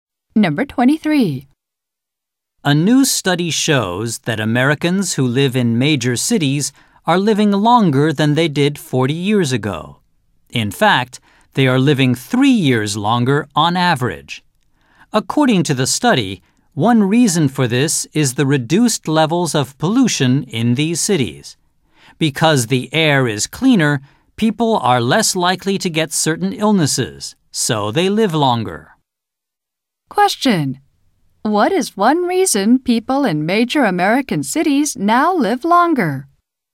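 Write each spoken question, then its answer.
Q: What is one reason people in major American cities now live longer?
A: Reduced levels of pollution (cleaner air)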